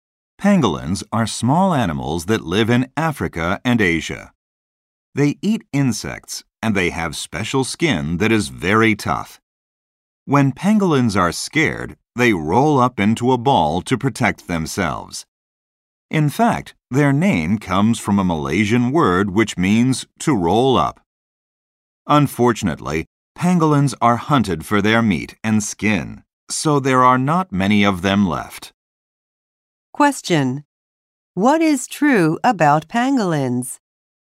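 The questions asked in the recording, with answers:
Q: What is true about pangolins?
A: They roll into a ball when scared; few are left because they are hunted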